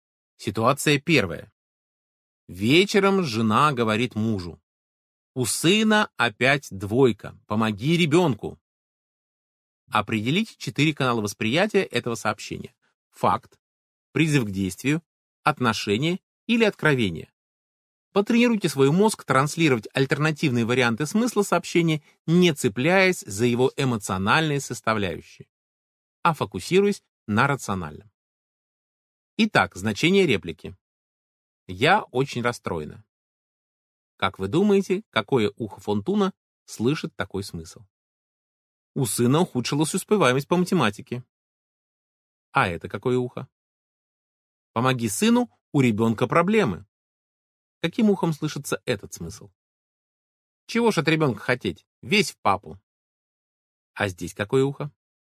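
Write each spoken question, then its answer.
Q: Как вы думаете, какое ухо Фонтуна слышит такой смысл?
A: откровение

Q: А это какое ухо?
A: факт

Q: Каким ухом слышится этот смысл?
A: призыв к действию

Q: А здесь какое ухо?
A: отношение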